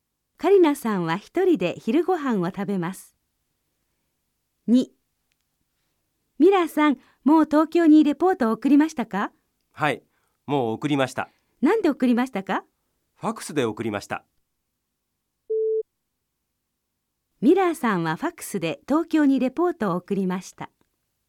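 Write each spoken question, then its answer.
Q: ミラーさんはファックスで東京にレポートを送りました。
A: ○(はい)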